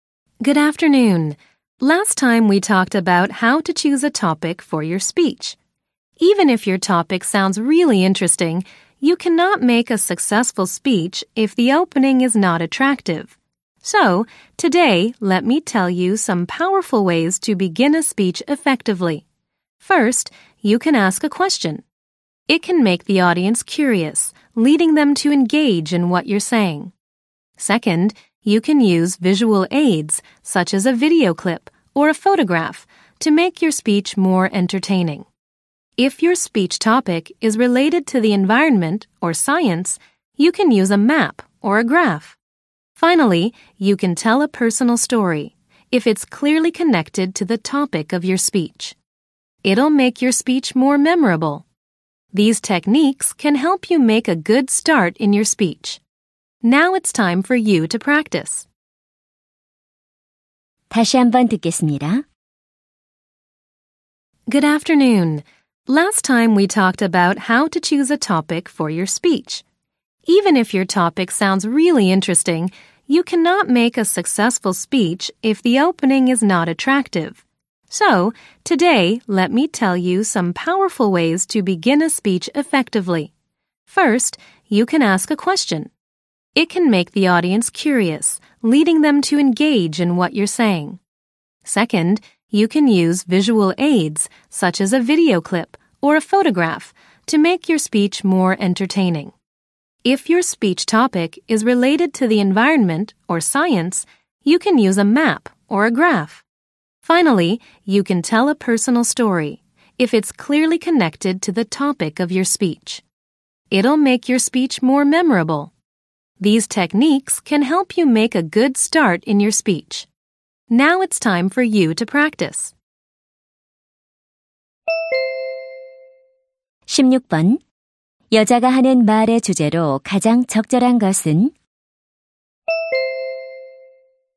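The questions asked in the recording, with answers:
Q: 여자가 하는 말의 주제로 가장 적절한 것은?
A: 연설을 효과적으로 시작하는 방법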